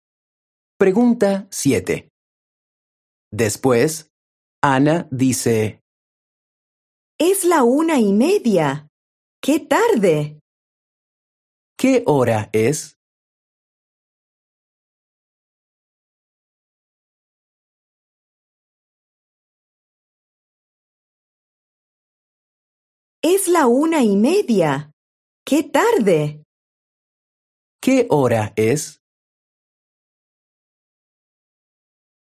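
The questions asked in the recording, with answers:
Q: ¿Qué hora es?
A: La 1:30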